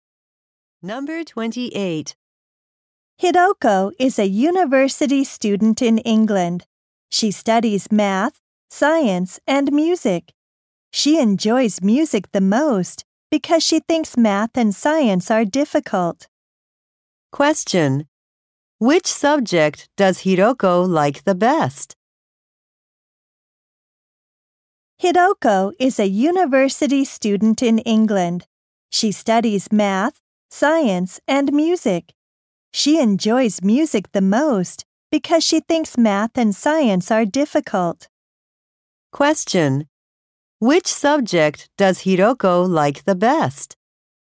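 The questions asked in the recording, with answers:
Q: Which subject does Hidoko like the best?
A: Music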